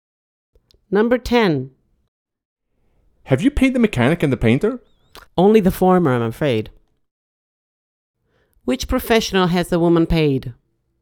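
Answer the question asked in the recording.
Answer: The mechanic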